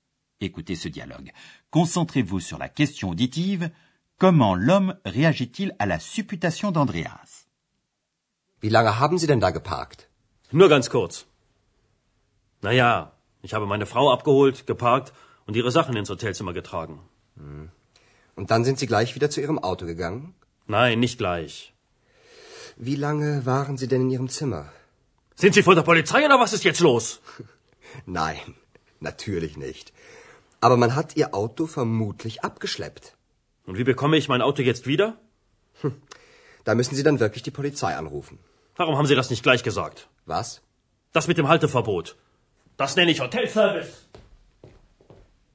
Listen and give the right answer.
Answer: Le client passe sa colère sur Andreas.